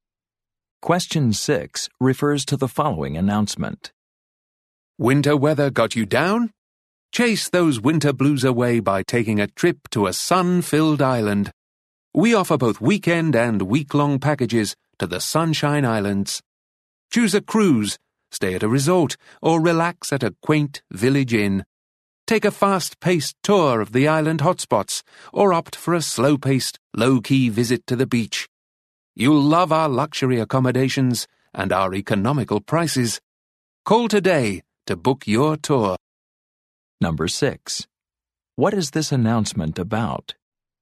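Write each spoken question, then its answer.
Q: What is this announcement about?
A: Vacation packages to the Sunshine Islands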